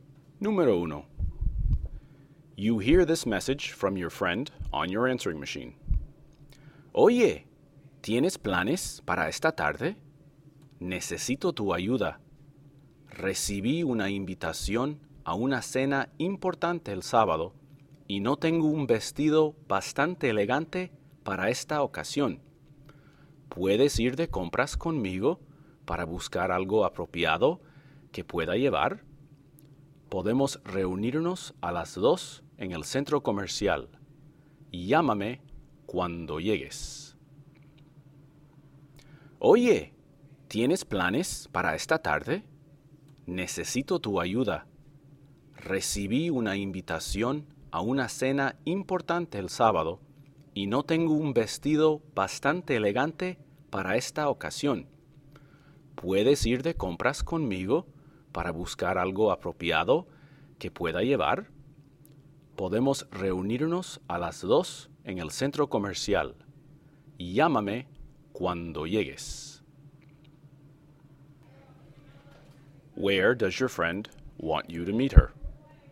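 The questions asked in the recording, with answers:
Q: Where does your friend want you to meet her?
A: At the shopping mall (en el centro comercial)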